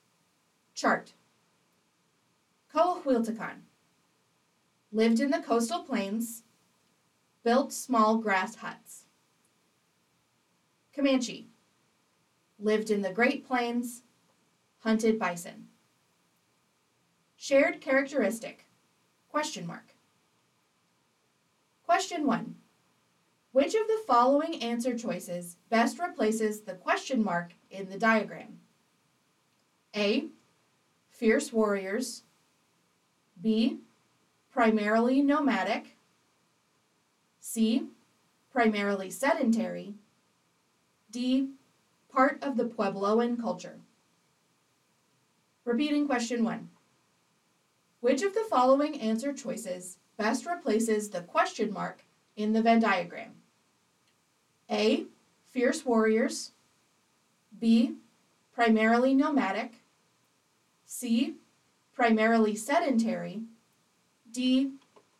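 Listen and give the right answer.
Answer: B: Primarily nomadic.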